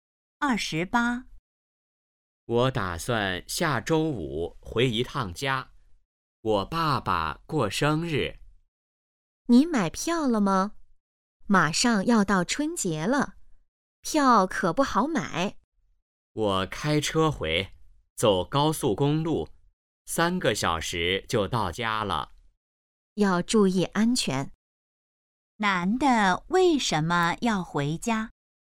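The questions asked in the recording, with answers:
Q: 男的为什么要回家?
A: 爸爸过生日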